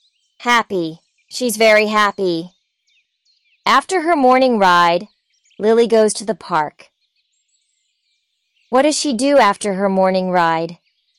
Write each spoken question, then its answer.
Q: What does she do after her morning ride?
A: She goes to the park.